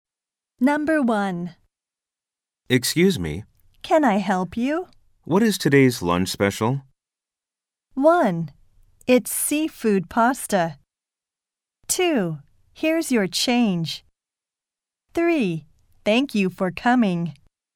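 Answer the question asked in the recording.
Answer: 1: It's seafood pasta.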